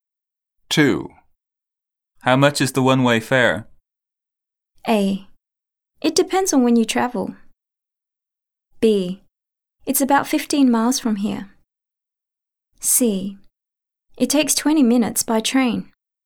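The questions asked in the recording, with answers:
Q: How much is the one-way fare?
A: A: It depends on when you travel.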